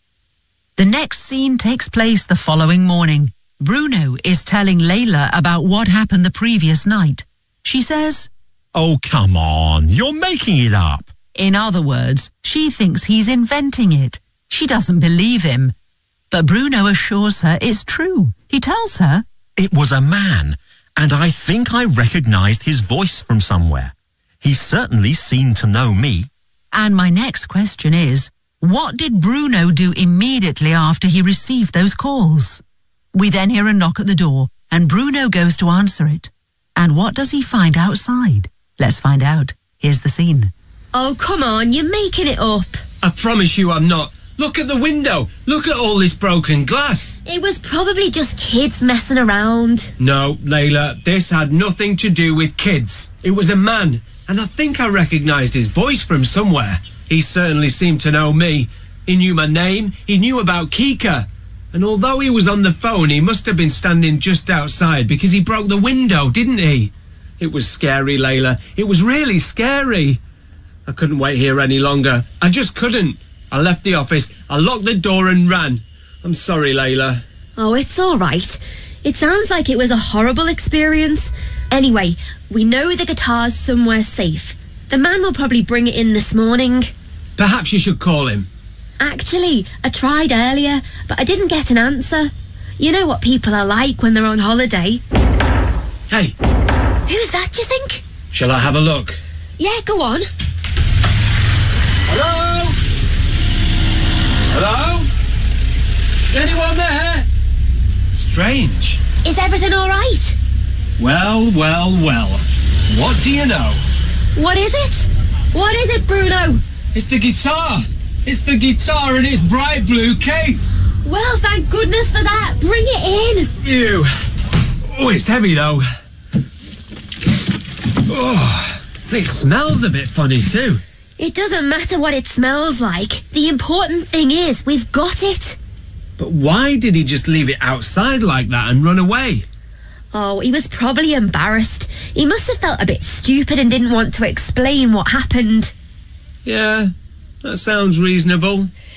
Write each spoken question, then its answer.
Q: what did Bruno do immediately after he received those calls?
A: I left the office, I locked the door, and I ran.

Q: And what does he find outside?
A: It's the guitar. It's the guitar in its bright blue case.